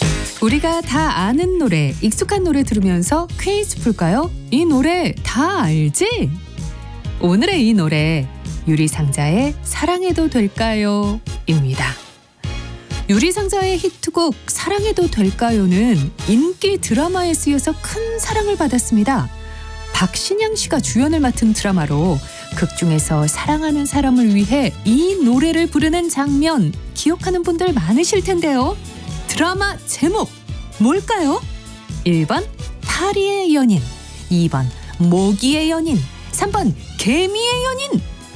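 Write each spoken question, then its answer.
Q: 드라마 제목 뭘까요?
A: 1번: 파리의 연인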